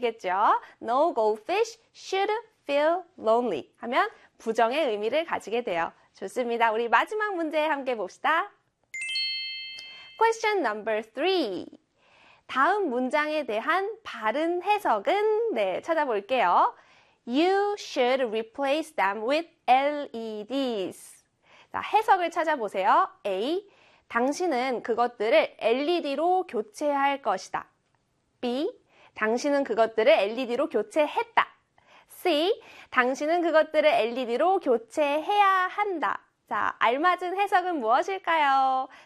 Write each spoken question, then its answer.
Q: 다음 문장에 대한 바른 해석은 네, 찾아볼게요. You should replace them with LEDs.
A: 그렇죠. C의 교체해야 한다를 찾아주시면 되겠죠.